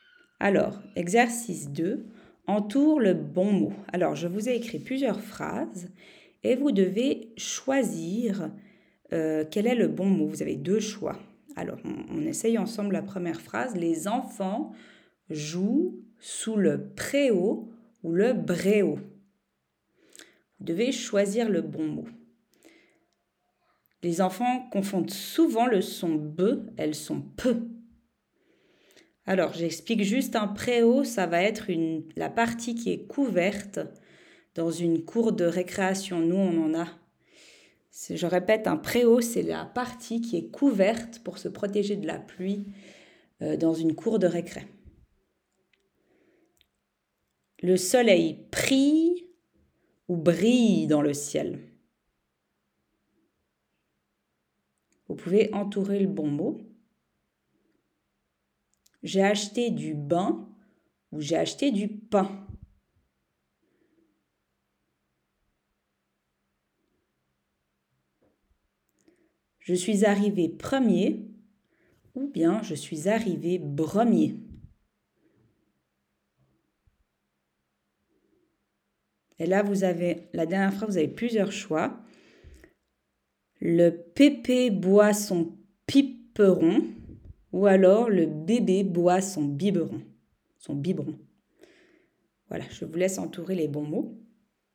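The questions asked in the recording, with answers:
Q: Les enfants jouent sous le préau ou le bréau.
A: préau

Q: Le soleil prie ou brille dans le ciel.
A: brille

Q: J'ai acheté du bain ou j'ai acheté du pain.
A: pain

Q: Le pépé boit son piperon.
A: Le bébé boit son biberon.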